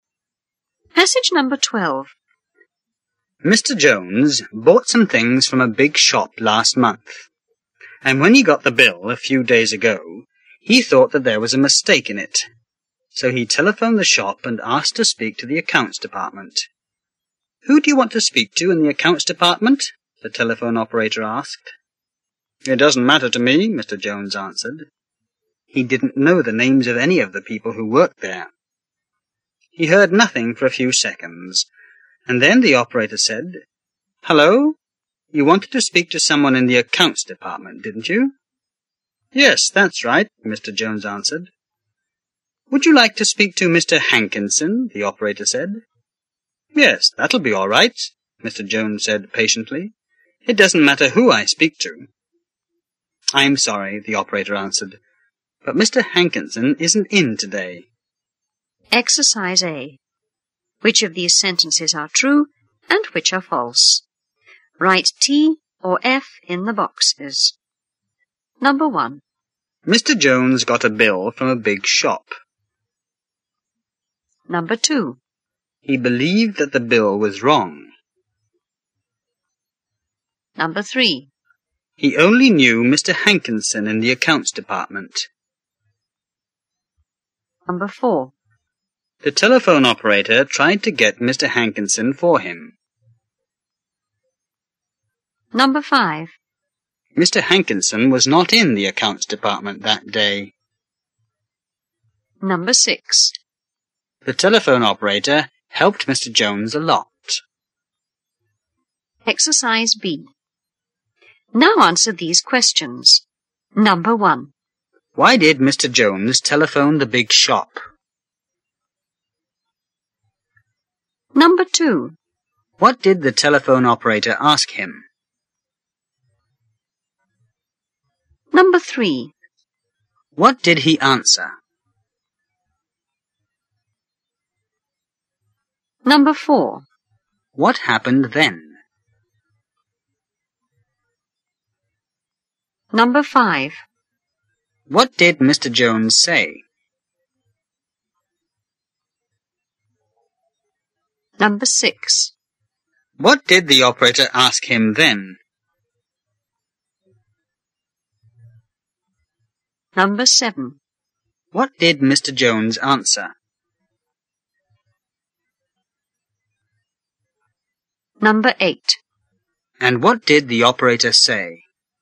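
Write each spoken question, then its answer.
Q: Mr. Jones got a bill from a big shop.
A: True

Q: He believed that the bill was wrong.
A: True

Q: He only knew Mr. Hankinson in the accounts department.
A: False

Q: The telephone operator tried to get Mr. Hankinson for him.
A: True

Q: Mr. Hankinson was not in the accounts department that day.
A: True

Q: The telephone operator helped Mr. Jones a lot.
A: False

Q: Why did Mr. Jones telephone the big shop?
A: He thought there was a mistake in his bill.

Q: What did the telephone operator ask him?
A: Who he wanted to speak to in the accounts department.

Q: What did he answer?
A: It didn't matter to him.

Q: What happened then?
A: He heard nothing for a few seconds, then the operator asked if he wanted someone in the accounts department.

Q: What did Mr. Jones say?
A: Yes, that's right.

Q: What did the operator ask him then?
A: Whether he would like to speak to Mr. 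Hankinson.

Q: What did Mr. Jones answer?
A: Yes, that would be all right; it didn't matter who he spoke to.

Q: And what did the operator say?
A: She was sorry, but Mr. Hankinson wasn't in that day.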